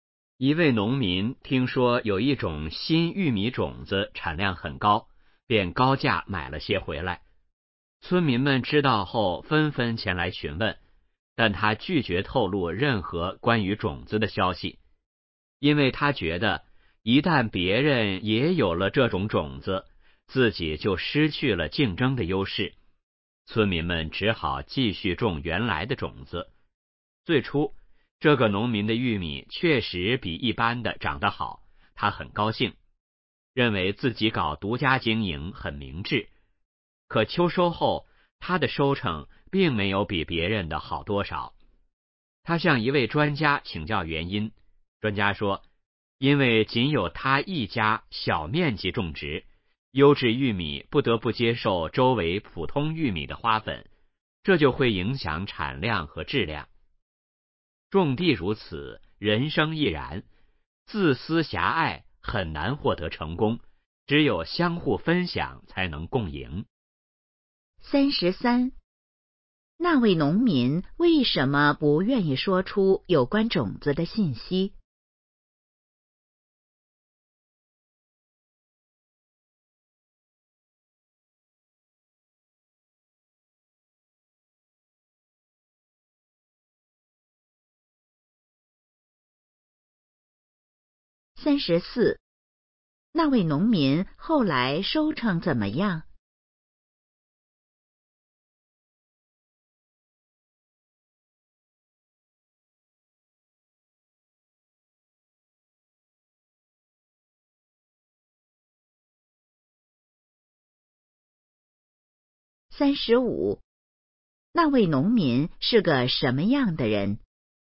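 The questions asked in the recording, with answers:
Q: 那位农民为什么不愿意说出有关种子的信息?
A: 怕失去竞争优势

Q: 那位农民后来收成怎么样?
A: 没比别人好多少

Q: 那位农民是个什么样的人?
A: 自私狭隘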